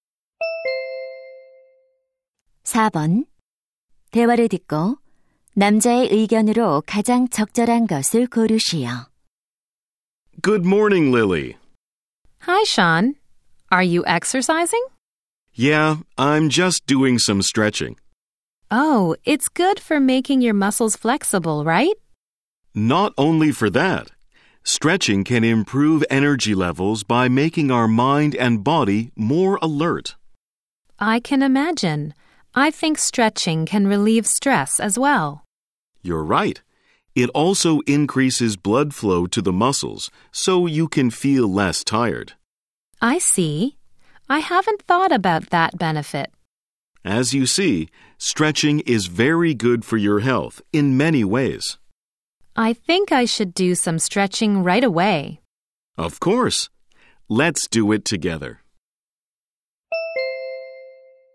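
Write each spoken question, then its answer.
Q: 대화를 듣고 남자의 의견으로 가장 적절한 것을 고르시오.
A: 스트레칭은 여러 면에서 건강에 좋다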